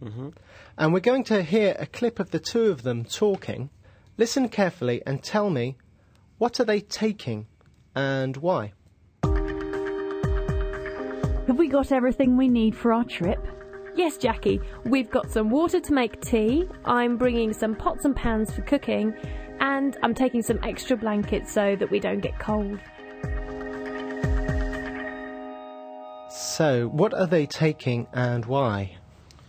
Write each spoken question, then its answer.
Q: what are they taking and why?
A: Jackie and Eleanor are taking some water to make tea, some pots and pans for cooking, and some extra blankets so they don't get cold.